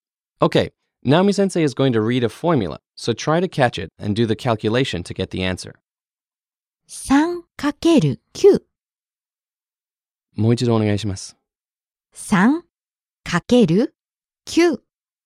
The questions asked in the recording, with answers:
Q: Okay, Naomi-sensei is going to read a formula, so try to catch it and do the calculation to get the answer.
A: So of course that would be 27 or 27.